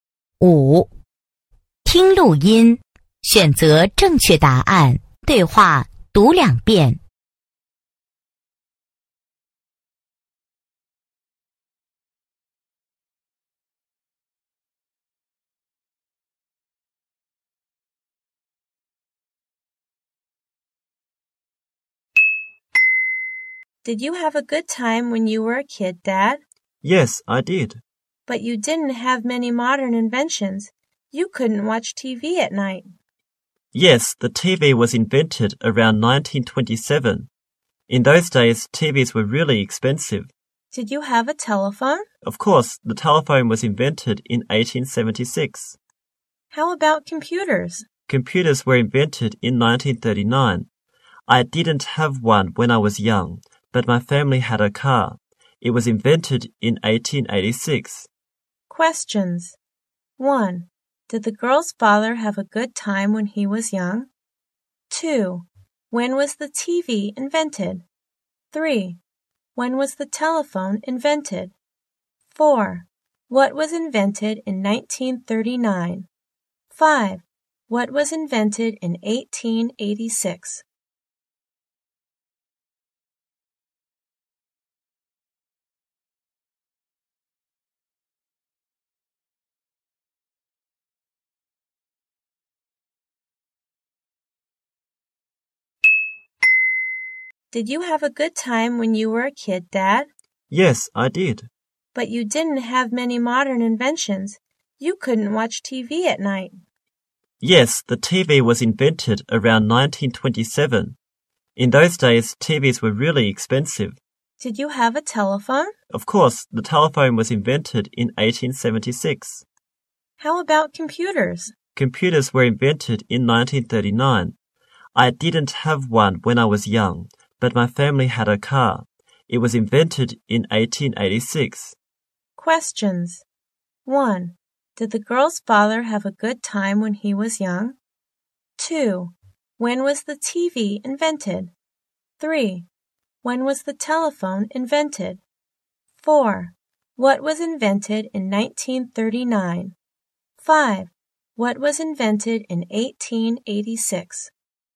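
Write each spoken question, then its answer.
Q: Did the girl's father have a good time when he was young?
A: Yes, he did.

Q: When was the TV invented?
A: Around 1927.

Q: When was the telephone invented?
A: In 1876.

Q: What was invented in 1939?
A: Computers.

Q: What was invented in 1886?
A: The car.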